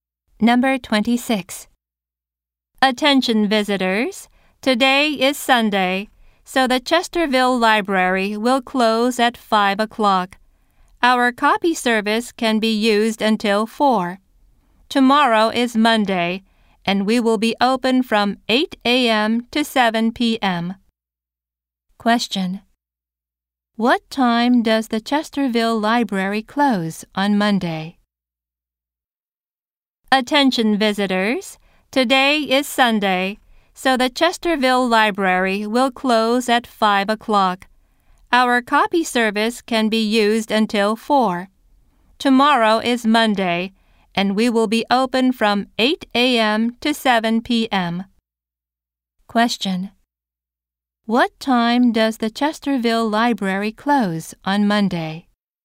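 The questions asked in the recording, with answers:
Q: What time does the Chesterville Library close on Monday?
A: At 7 p.m.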